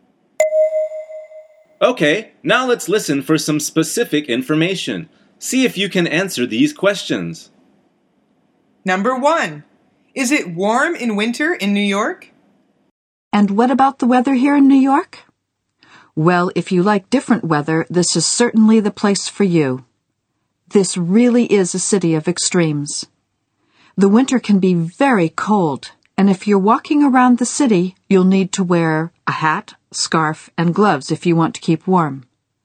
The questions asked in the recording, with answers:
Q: is it warm in winter in New York?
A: The answer is no. It can be very cold.